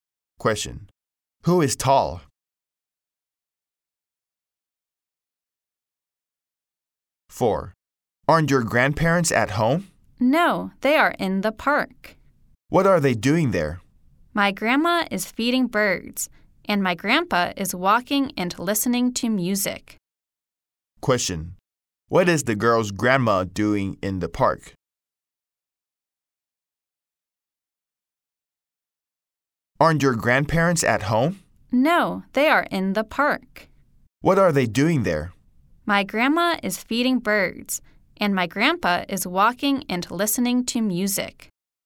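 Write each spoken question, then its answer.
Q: What is the girl's grandma doing in the park?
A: She is feeding birds.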